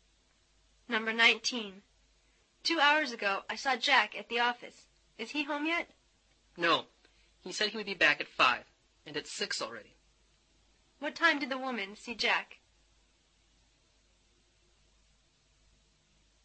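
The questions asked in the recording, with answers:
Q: What time did the woman see Jack?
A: 4 o'clock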